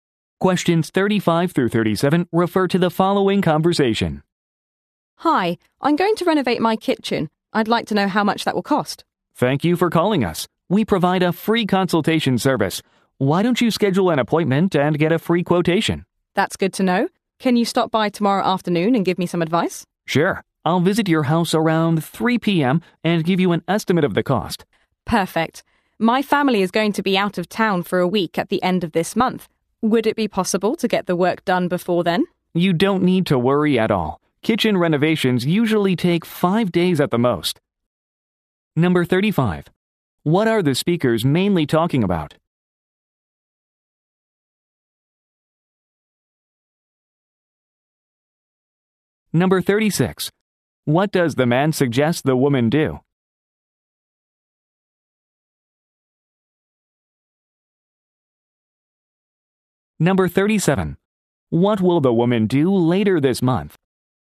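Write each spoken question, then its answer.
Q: What are the speakers mainly talking about?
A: A kitchen renovation

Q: What does the man suggest the woman do?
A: Schedule an appointment for a free quotation

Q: What will the woman do later this month?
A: Go out of town with her family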